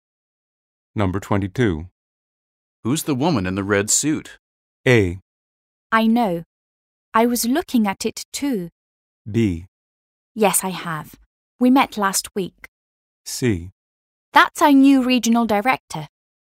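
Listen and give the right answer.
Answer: C: That's our new regional director.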